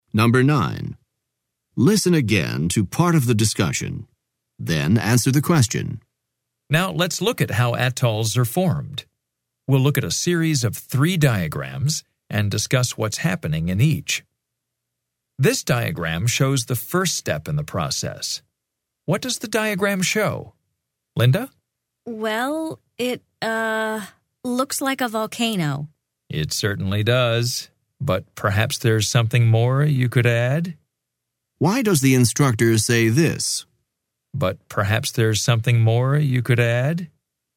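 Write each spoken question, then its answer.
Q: Why does the instructor say this?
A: To suggest that Linda's answer is incomplete and encourage her to say more about the diagram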